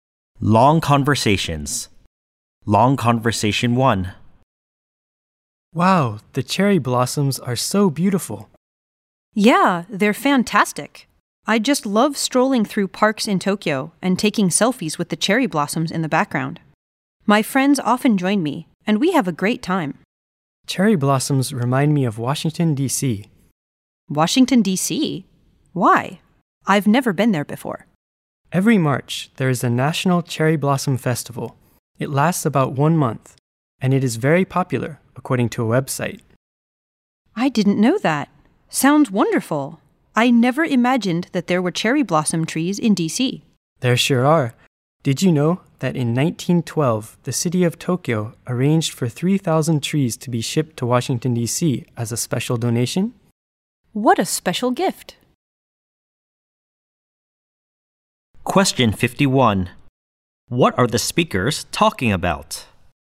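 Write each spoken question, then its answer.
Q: What are the speakers talking about?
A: Cherry blossoms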